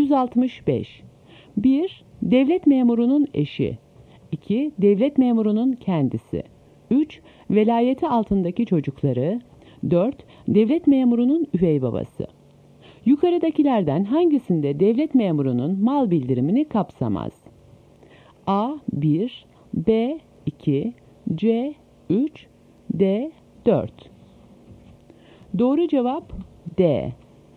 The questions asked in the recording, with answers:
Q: Yukarıdakilerden hangisinde devlet memurunun mal bildirimini kapsamaz?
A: Doğru cevap D.